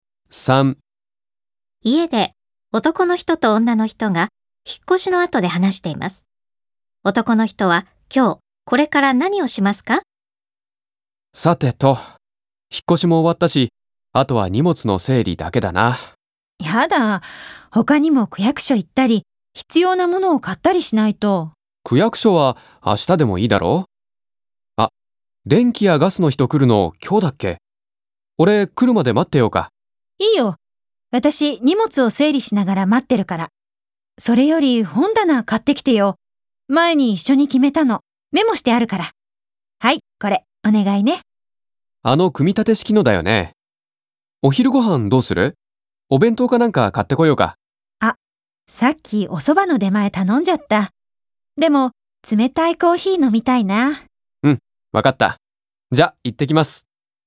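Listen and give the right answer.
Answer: 本棚と冷たいコーヒーを買いに行く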